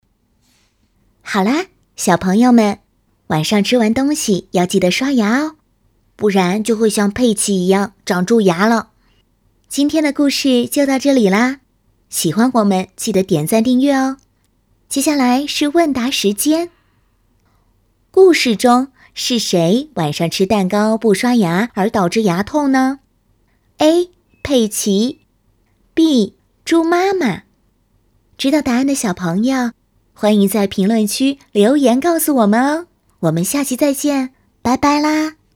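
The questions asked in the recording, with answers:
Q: 故事中是谁晚上吃蛋糕不刷牙而导致牙痛呢?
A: A: 佩奇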